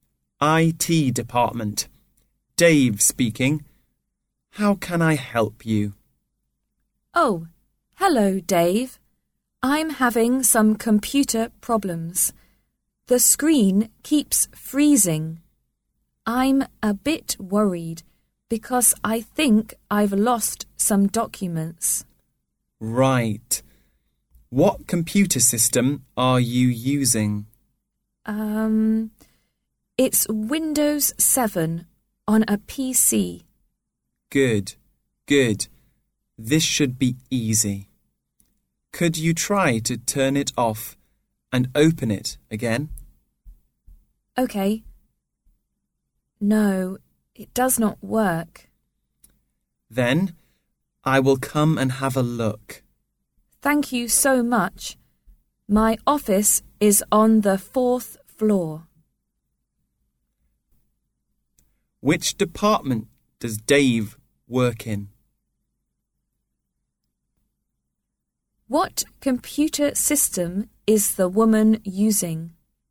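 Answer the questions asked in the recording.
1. IT department
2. Windows 7 on a PC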